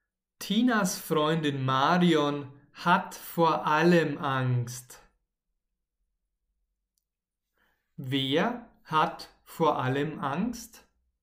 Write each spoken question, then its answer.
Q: Wer hat vor allem Angst?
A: Marion Tinas Freundin Marion.